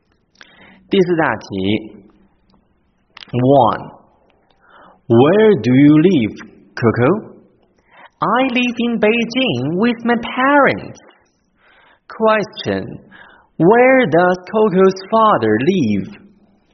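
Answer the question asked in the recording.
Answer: In Beijing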